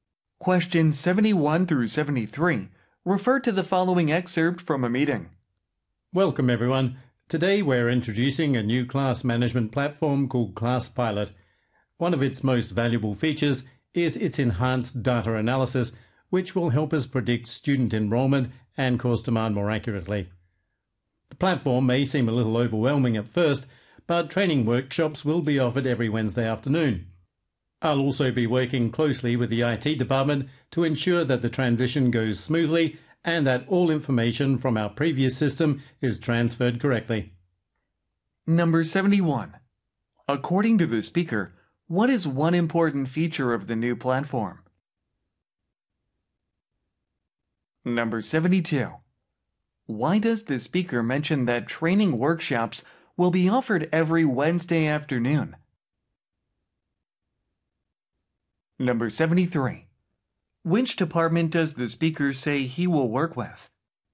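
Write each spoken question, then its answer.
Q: According to the speaker, what is one important feature of the new platform?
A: is its enhanced data analysis

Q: Why does the speaker mention that training workshops will be offered every Wednesday afternoon?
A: To reassure listeners, because the platform may seem overwhelming at first

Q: Which department does the speaker say he will work with?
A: The IT department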